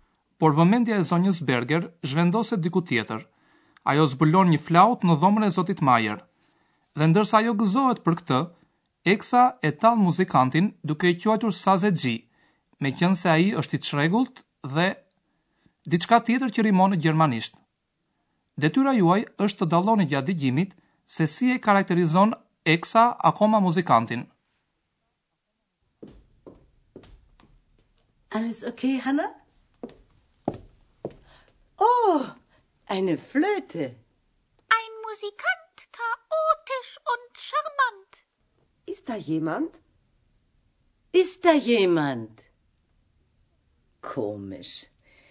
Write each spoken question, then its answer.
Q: Detyra juaj është të dalloni gjatë dëgjimit se si e karakterizon Eksa akoma muzikantin.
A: Eksa e quan muzikantin edhe simpatik, në gjermanisht charmant.